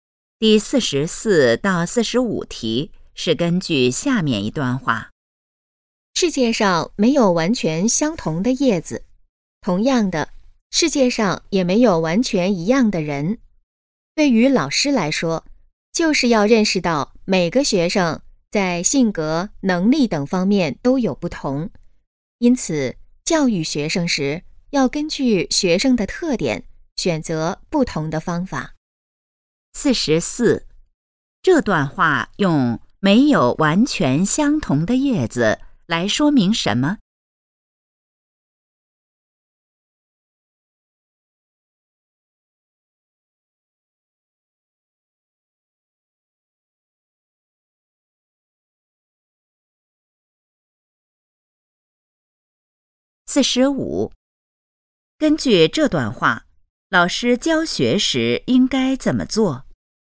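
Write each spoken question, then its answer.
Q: 这段话用没有完全相同的叶子来说明什么?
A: 每个人都不一样

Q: 根据这段话,老师教学时应该怎么做?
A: 根据学生的特点选择不同的方法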